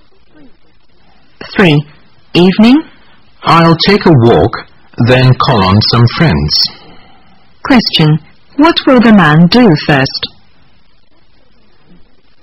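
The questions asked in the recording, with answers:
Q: What will the man do first?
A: Take a walk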